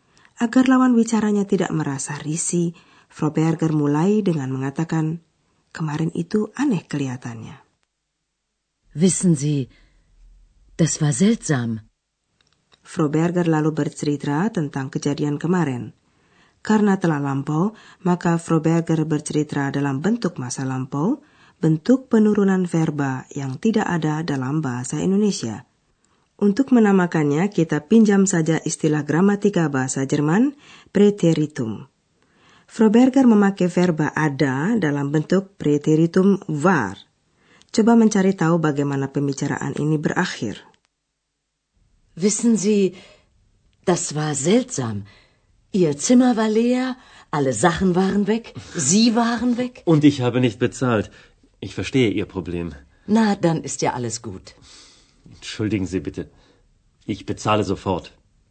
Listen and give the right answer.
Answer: Tuan Mayer mau langsung membayar kamarnya.